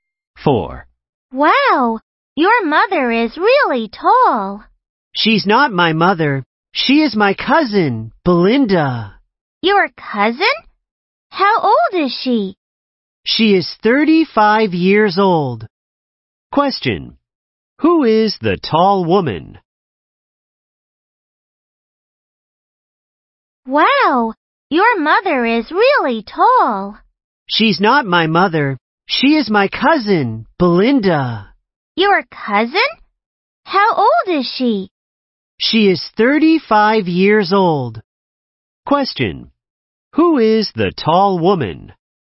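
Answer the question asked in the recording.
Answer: Belinda, the speaker's cousin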